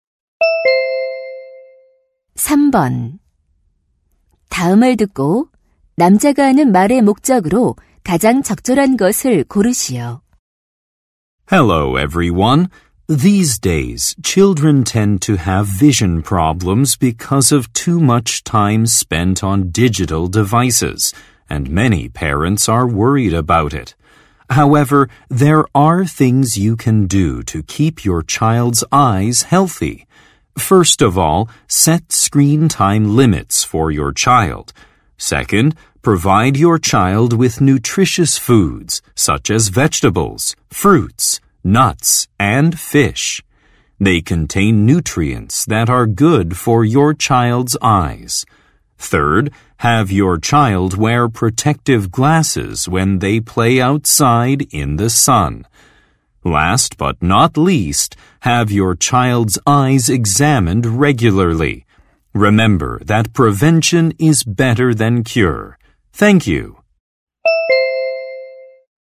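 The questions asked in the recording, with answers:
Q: 다음을 듣고 남자가 하는 말의 목적으로 가장 적절한 것을 고르시오.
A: 자녀의 눈 건강을 지키는 방법을 알려 주려고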